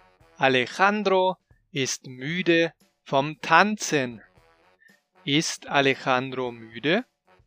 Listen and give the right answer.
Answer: Ja, genau. Er ist müde vom Tanzen.